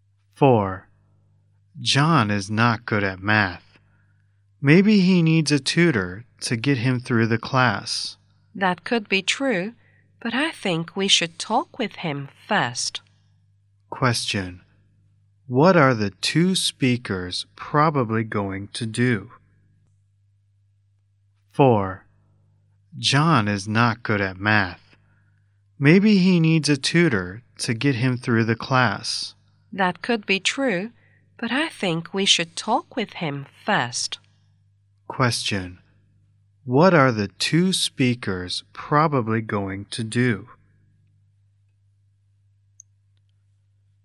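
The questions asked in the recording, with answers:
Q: What are the two speakers probably going to do?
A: Talk with John first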